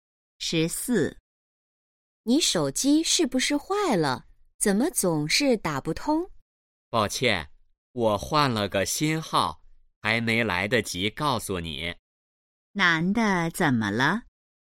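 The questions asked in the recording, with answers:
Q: 男的怎么了?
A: 换了个新手机号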